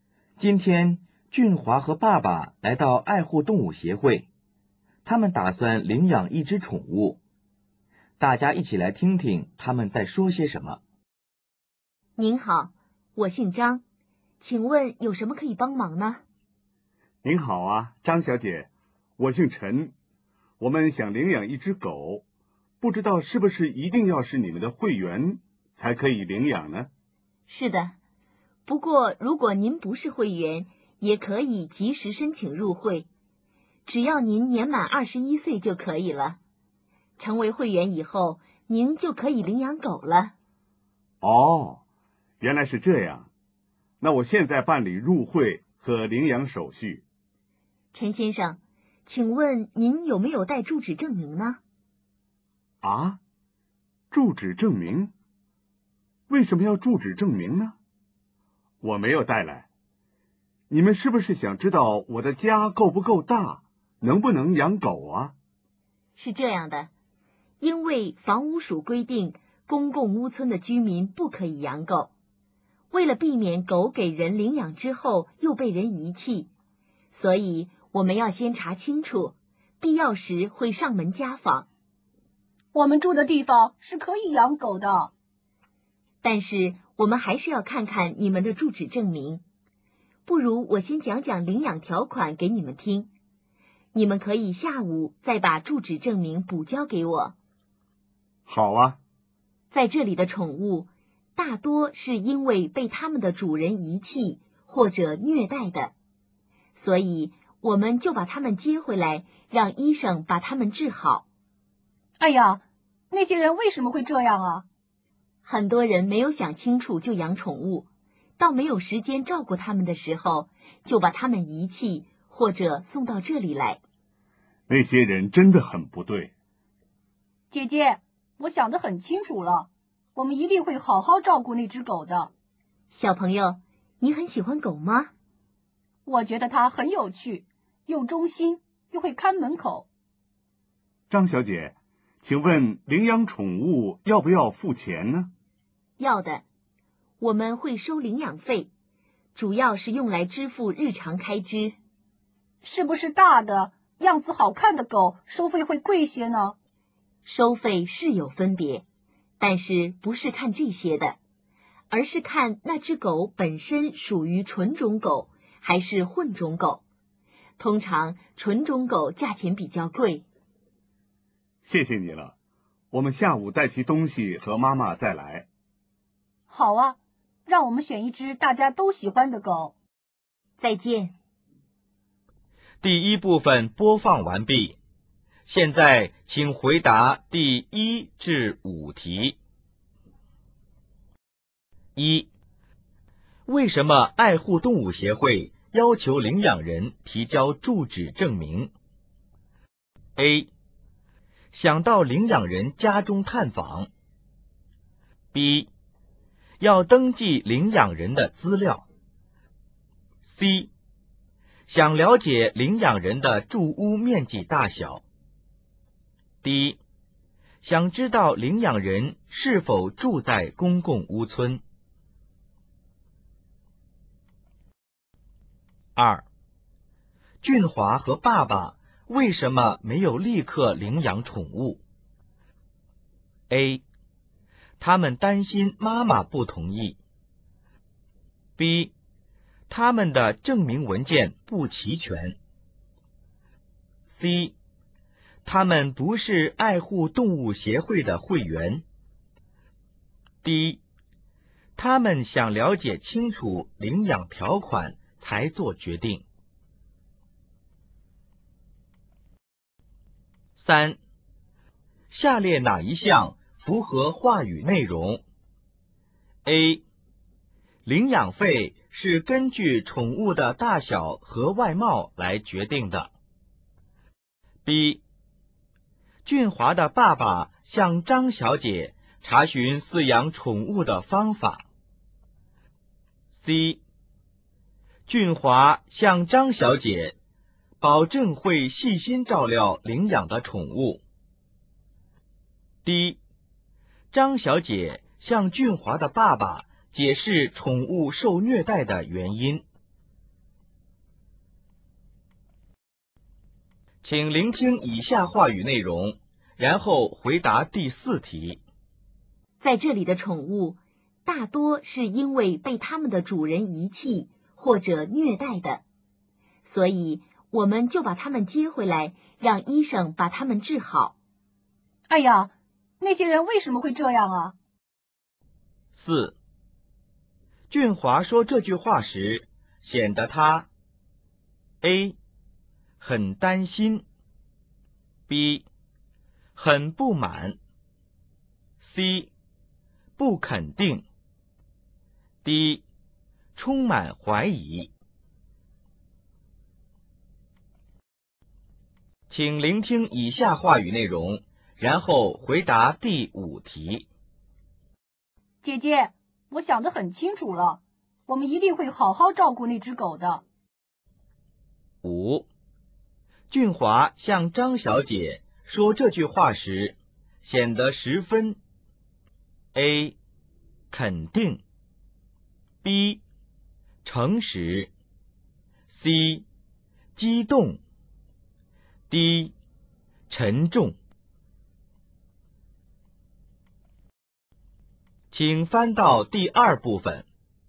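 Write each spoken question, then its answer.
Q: 为什么爱护动物协会要求领养人提交住址证明?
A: D: 想知道领养人是否住在公共屋邨。

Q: 俊华和爸爸为什么没有立刻领养宠物?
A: B: 他们的证明文件不齐全。

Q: 下列哪一项符合话语内容?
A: C: 俊华向张小姐保证会细心照料领养的宠物。

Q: 俊华说这句话时显得他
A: B: 很不满

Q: 俊华向张小姐说这句话时显得十分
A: A: 肯定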